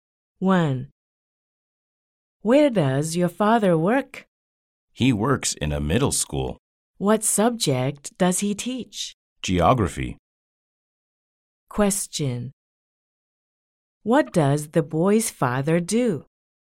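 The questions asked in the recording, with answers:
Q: What does the boy's father do?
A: He is a geography teacher.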